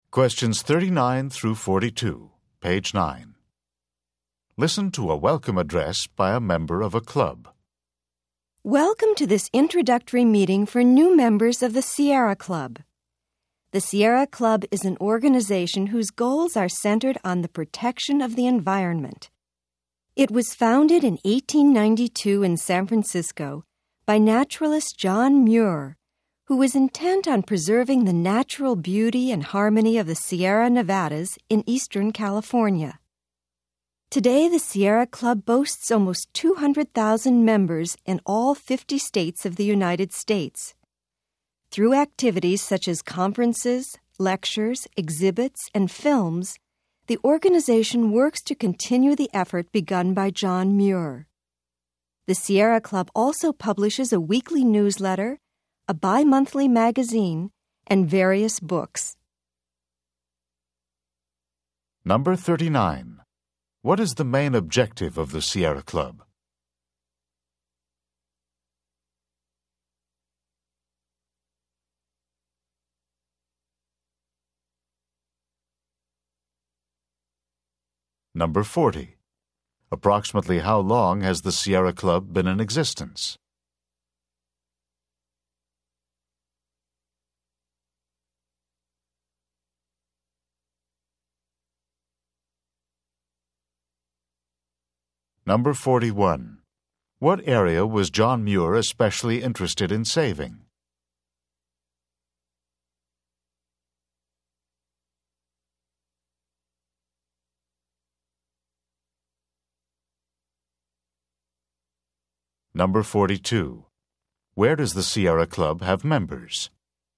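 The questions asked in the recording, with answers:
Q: What is the main objective of the Sierra Club?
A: Protecting the environment

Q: What area was John Muir especially interested in saving?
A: The Sierra Nevadas in eastern California

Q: Where does the Sierra Club have members?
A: In all 50 states of the United States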